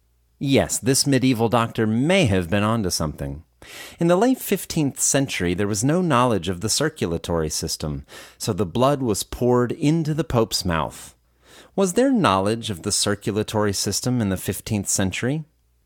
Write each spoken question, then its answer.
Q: Was there knowledge of the circulatory system in the 15th century?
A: No, there was no knowledge of the circulatory system in the 15th century.